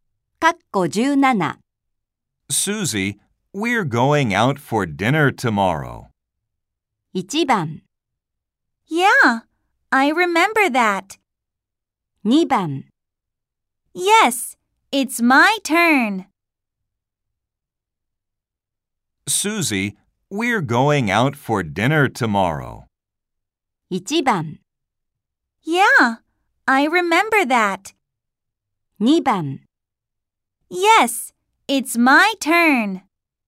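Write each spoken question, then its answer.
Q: Susie, we're going out for dinner tomorrow.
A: 1: Yeah, I remember that.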